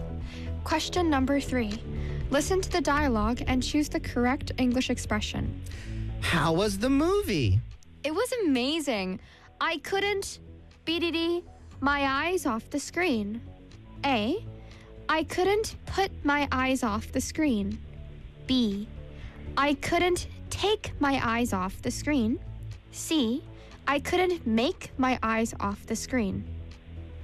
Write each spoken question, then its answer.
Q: Listen to the dialogue and choose the correct English expression.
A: 정답 B입니다.